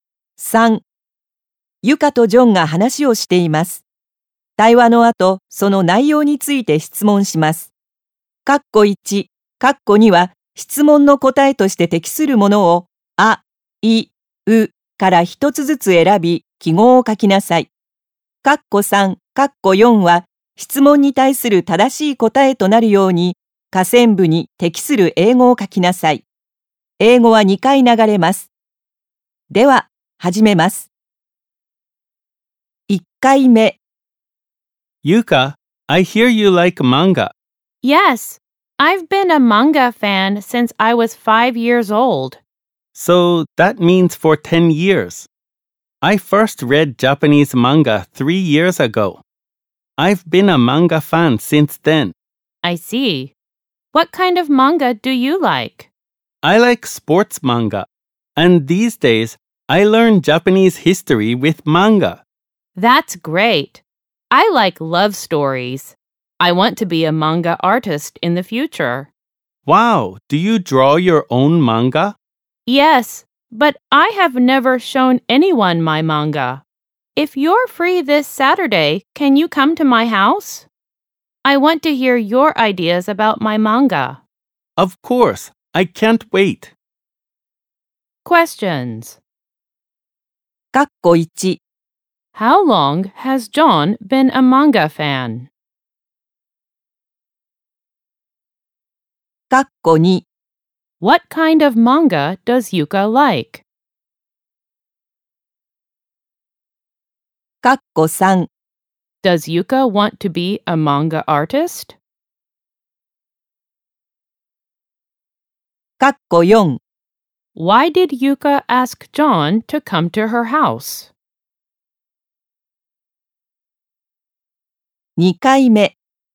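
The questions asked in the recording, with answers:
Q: How long has John been a manga fan?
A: For 3 years

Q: Why did Yuka ask John to come to her house?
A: Because she wants to hear his ideas about her manga.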